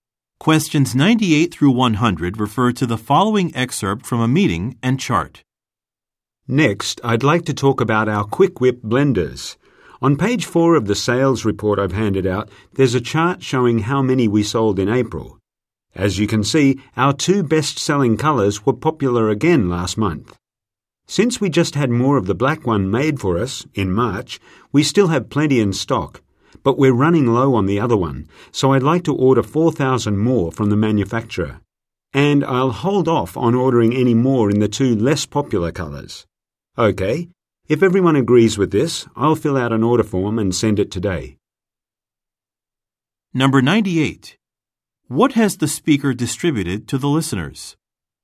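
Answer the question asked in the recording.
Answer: A sales report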